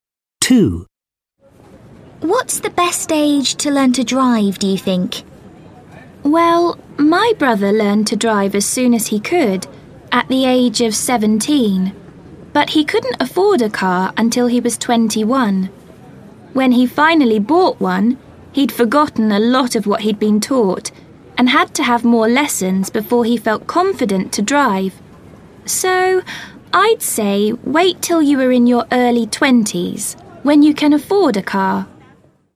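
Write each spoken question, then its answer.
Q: What's the best age to learn to drive, do you think?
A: In your early 20s, when you can afford a car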